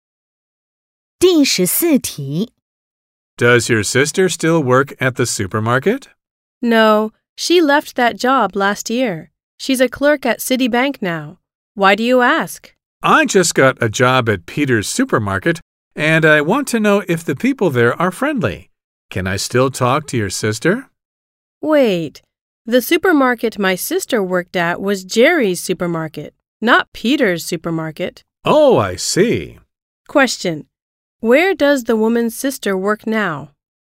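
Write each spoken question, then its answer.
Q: Where does the woman's sister work now?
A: At Citibank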